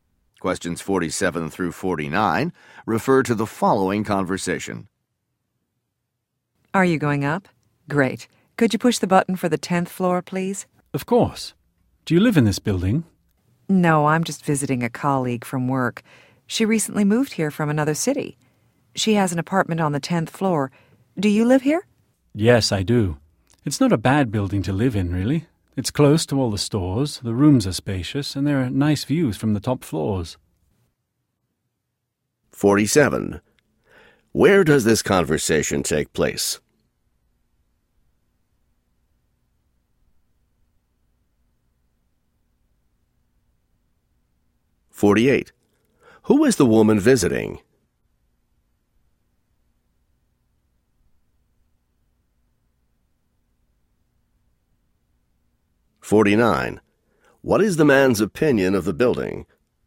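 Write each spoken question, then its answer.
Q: Where does this conversation take place?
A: In an elevator

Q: Who is the woman visiting?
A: A colleague from work

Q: What is the man's opinion of the building?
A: It's a good place to live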